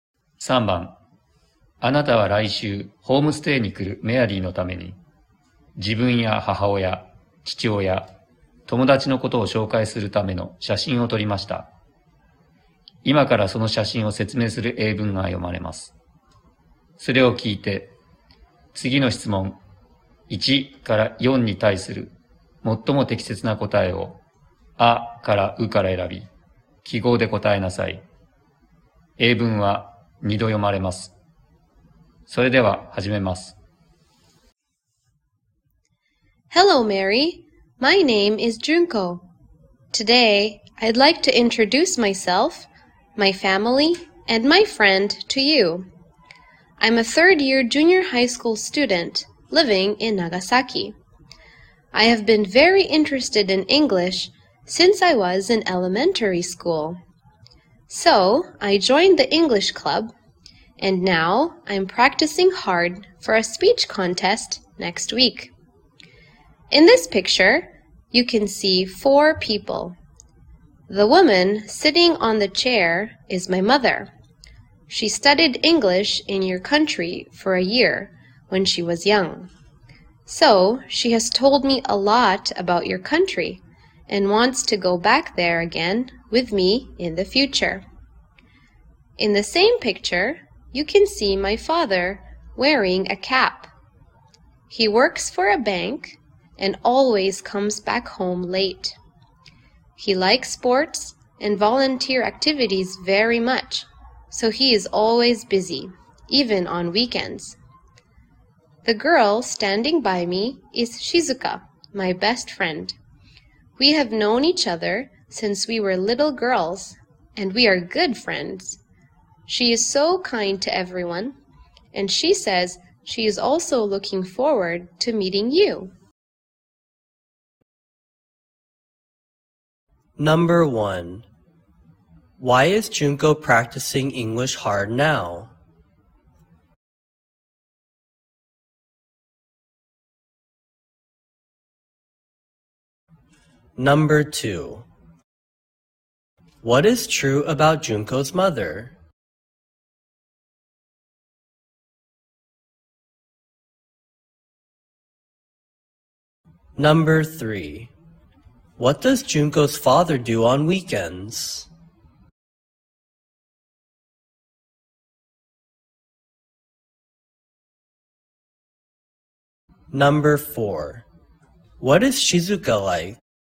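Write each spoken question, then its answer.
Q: Why is Junko practicing English hard now?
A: For a speech contest next week.

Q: What is true about Junko's mother?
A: She studied English in Mary's country for a year when she was young.

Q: What does Junko's father do on weekends?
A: He does sports and volunteer activities.

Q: What is Shizuka like?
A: She is kind to everyone.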